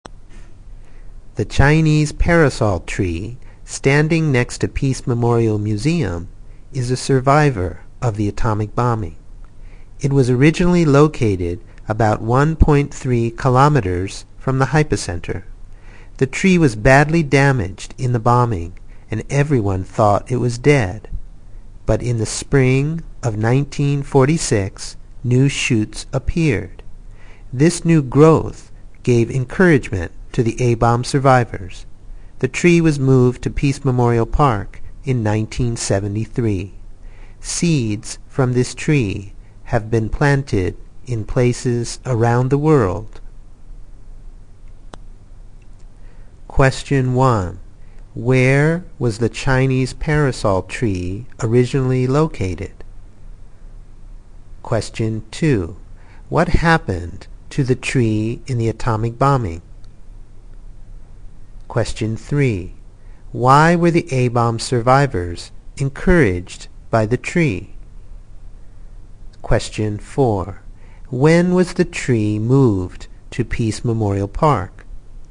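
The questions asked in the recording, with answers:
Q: Where was the Chinese parasol tree originally located?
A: About 1.3 kilometers from the hypocenter

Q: What happened to the tree in the atomic bombing?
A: It was badly damaged, and everyone thought it was dead

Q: Why were the A-bomb survivors encouraged by the tree?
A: Because new shoots appeared in the spring of 1946

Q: When was the tree moved to Peace Memorial Park?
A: In 1973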